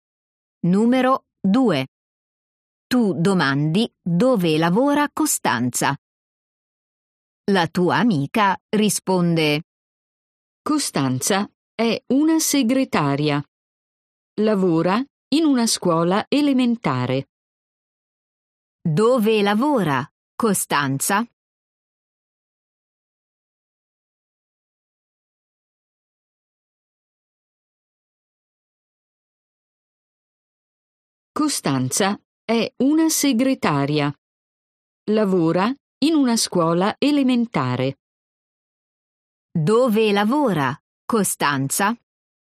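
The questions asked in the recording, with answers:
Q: Dove lavora Costanza?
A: In una scuola elementare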